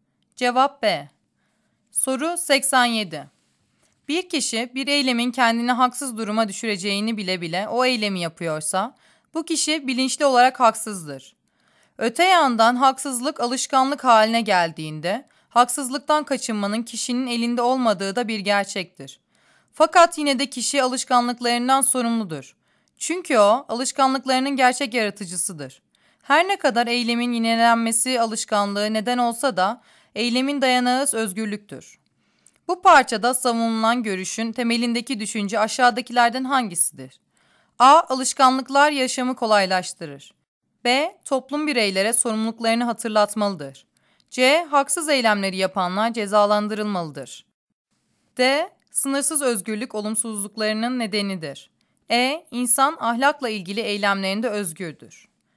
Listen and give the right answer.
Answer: Cevap E.